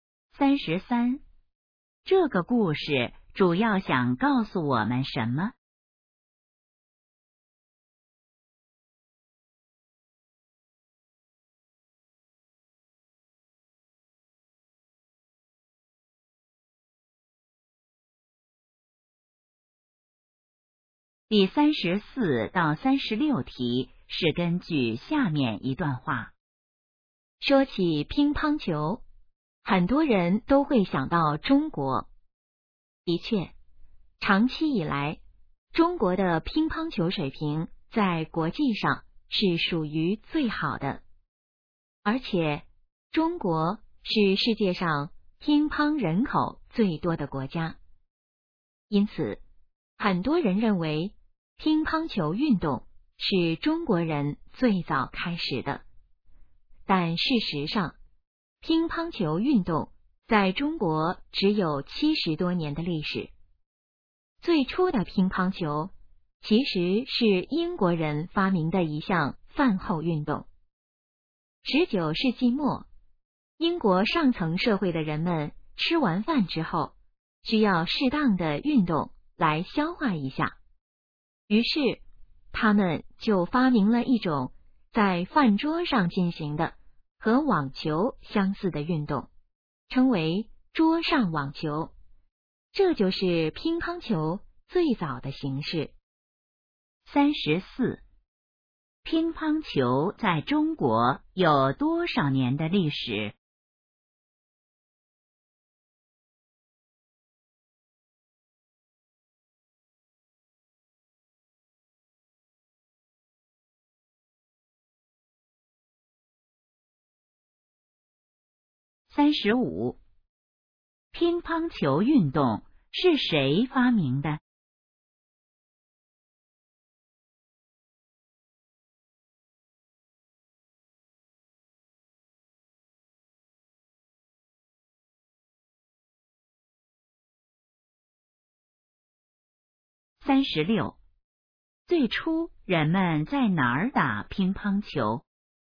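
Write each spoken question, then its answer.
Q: 乒乓球在中国有多少年的历史?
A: 70多年

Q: 乒乓球运动是谁发明的?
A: 英国人

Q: 最初人们在哪儿打乒乓球?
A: 饭桌上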